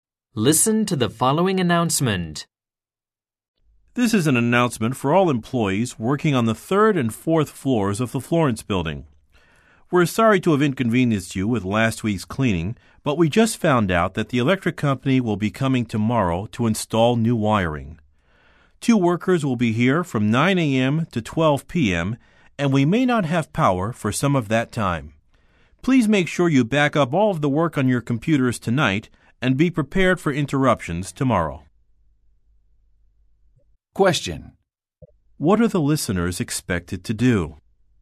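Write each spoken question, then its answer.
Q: What are the listeners expected to do?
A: Back up all the work on their computers tonight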